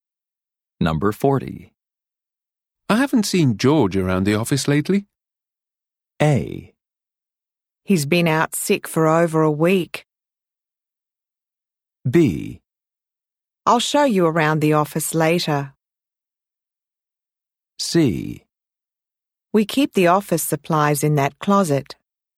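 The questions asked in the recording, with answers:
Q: I haven't seen George around the office lately.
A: A: He's been out sick for over a week.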